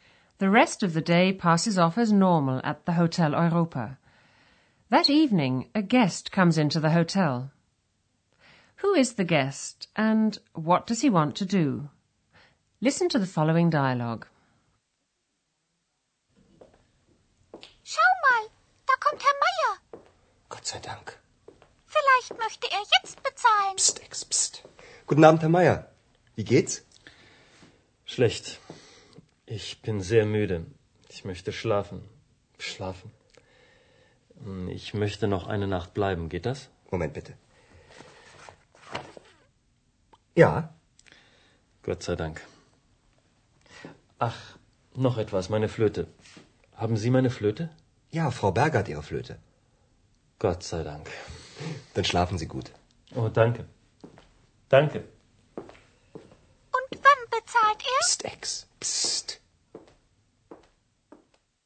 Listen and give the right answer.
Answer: The guest is Herr Meyer, who's returned to the hotel. He's very tired, and all he wants to do is sleep.